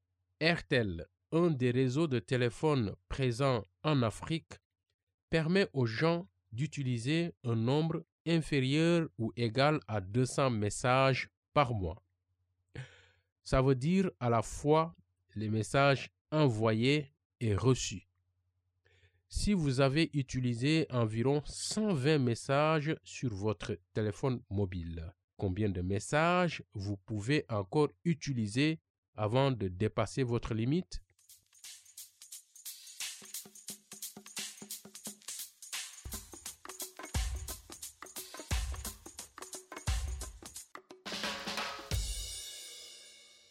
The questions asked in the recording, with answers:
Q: Si vous avez utilisé environ 120 messages sur votre téléphone mobile, combien de messages vous pouvez encore utiliser avant de dépasser votre limite?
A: Je pense que je peux encore utiliser 80 messages de plus.